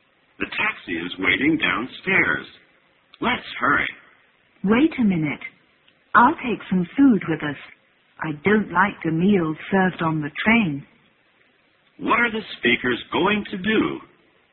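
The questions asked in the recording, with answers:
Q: What are the speakers going to do?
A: Take a taxi to catch a train (go on a train trip).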